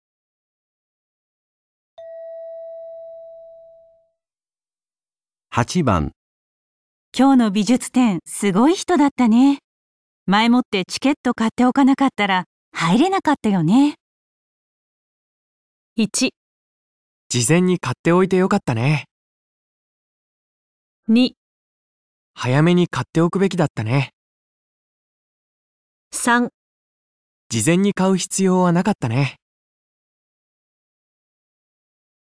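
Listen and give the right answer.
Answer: 事前に買っておいてよかった

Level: N1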